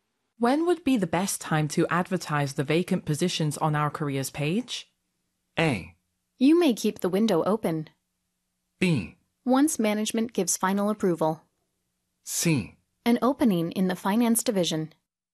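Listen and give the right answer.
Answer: B: Once management gives final approval.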